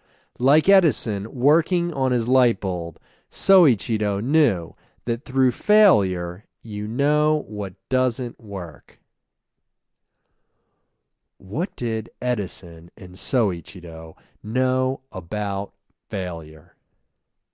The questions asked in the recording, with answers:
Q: What did Edison and Soichiro know about failure?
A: They knew that through failure, you know what doesn't work.